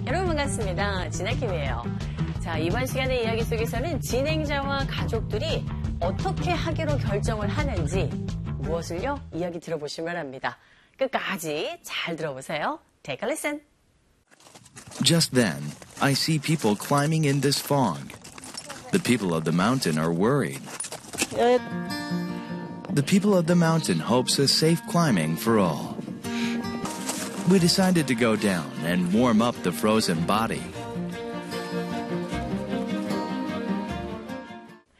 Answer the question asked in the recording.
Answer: 온몸을 녹이기 위해서 내려가기로 결정을 합니다.